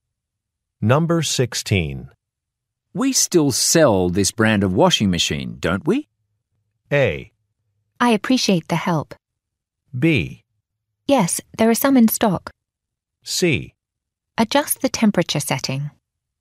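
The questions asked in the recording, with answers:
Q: We still sell this brand of washing machine, don't we?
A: B: Yes, there are some in stock.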